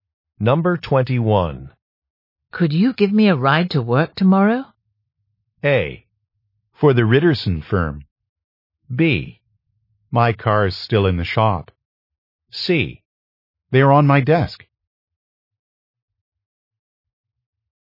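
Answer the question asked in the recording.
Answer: B: My car is still in the shop.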